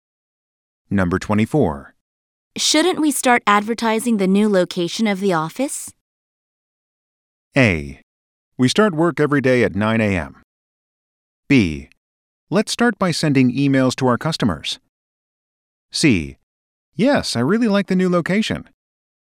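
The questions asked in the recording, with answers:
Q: Shouldn't we start advertising the new location of the office?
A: B: Let's start by sending emails to our customers.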